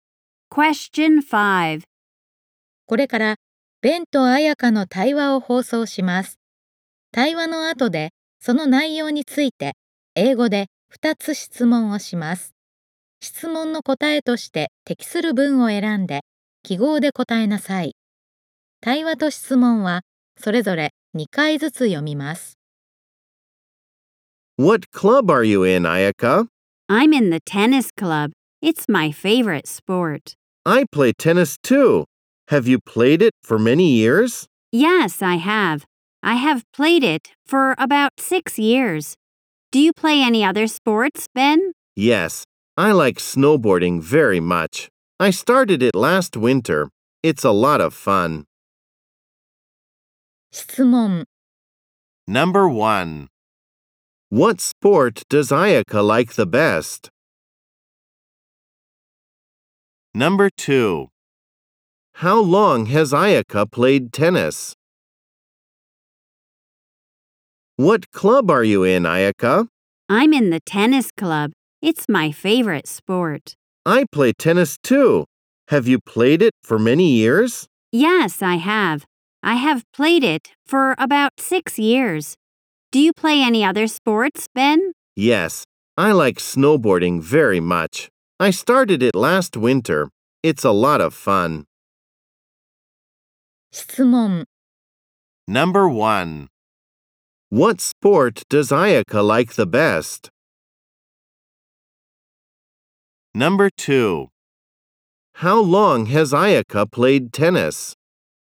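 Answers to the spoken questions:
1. Tennis.
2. For about six years.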